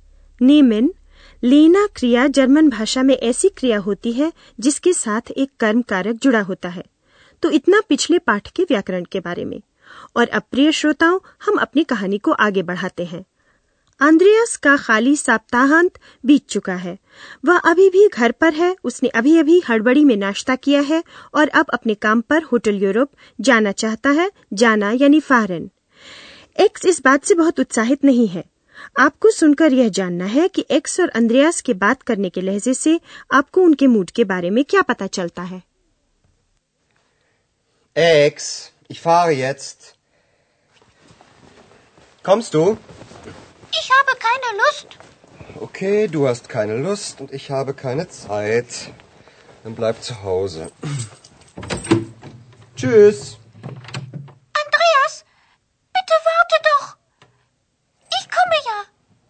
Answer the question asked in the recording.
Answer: आप समझ गए कि x उदासीन है और Andreas झल्लाया हुआ है